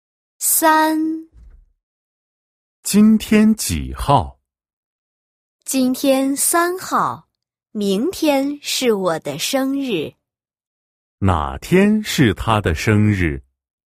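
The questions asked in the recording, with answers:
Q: 哪天是她的生日?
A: 四号(明天)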